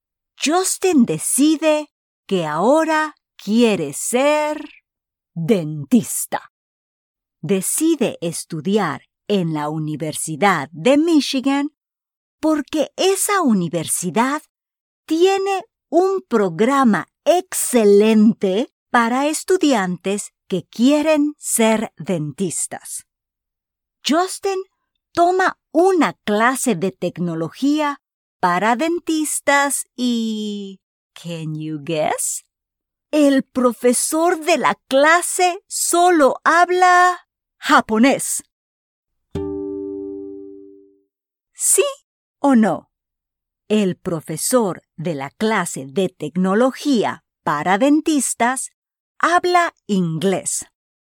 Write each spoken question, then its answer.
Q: ¿Sí o no? El profesor de la clase de tecnología para dentistas Habla inglés.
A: No, el profesor de la clase de tecnología para dentistas no habla inglés.